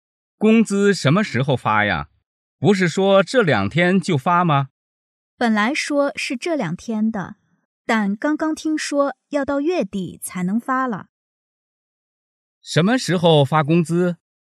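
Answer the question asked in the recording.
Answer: 月底

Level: 汉语水平考试(MHK)三级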